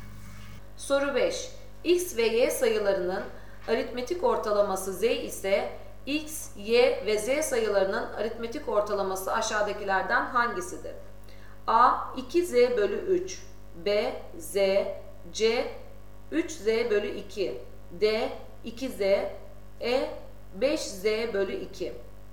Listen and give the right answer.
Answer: Doğru cevap B Z.